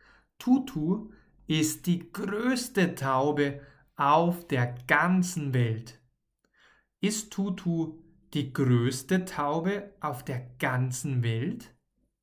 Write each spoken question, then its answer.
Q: Ist Tutu die größte Taube auf der ganzen Welt?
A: Ja, das ist sie.